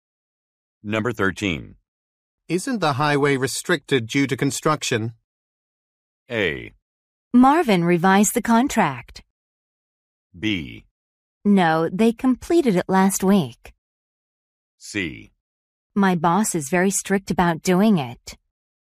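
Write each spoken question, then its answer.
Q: Isn't the highway restricted due to construction?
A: B: No, they completed it last week.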